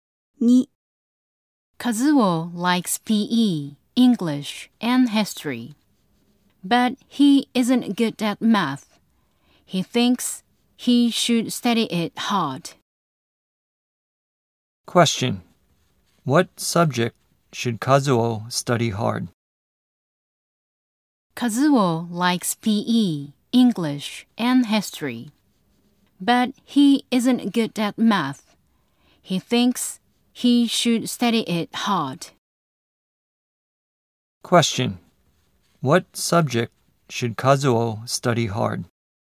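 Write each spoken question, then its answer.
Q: What subject should Kazuo study hard?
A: Math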